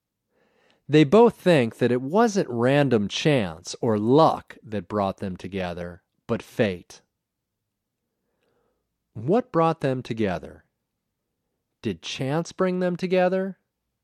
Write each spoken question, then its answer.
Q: What brought them together?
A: Fate brought them together.

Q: Did chance bring them together?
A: No, chance didn't bring them together.